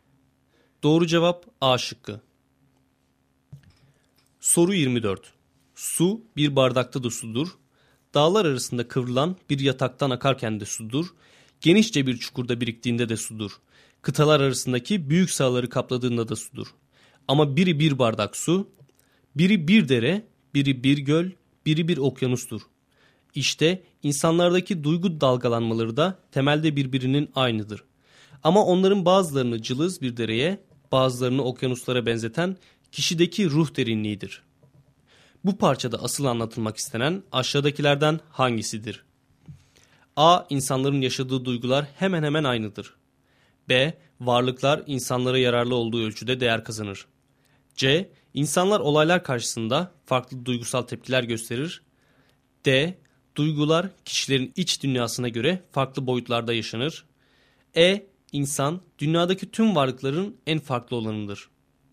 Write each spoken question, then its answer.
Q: Bu parçada asıl anlatılmak istenen aşağıdakilerden hangisidir?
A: Doğru cevap D şıkkı.